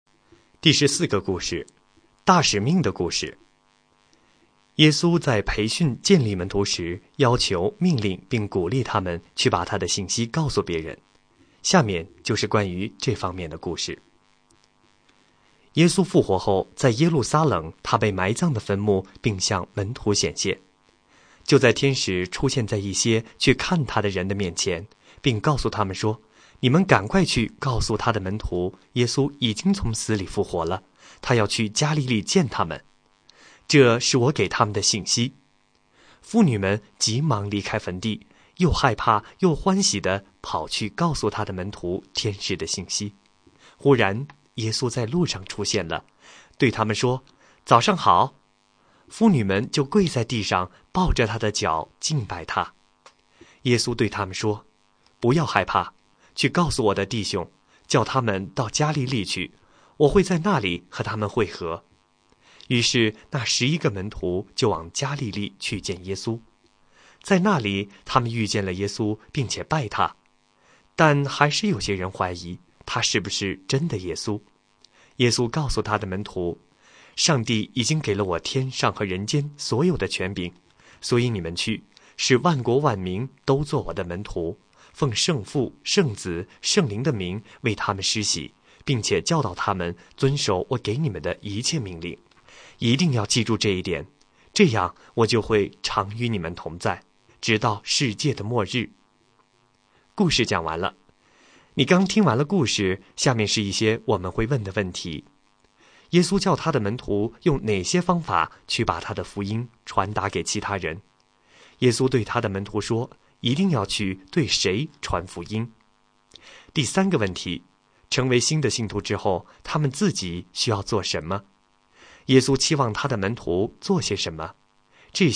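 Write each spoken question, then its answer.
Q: 耶稣对他的门徒说,一定要去对谁传福音。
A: 万国万民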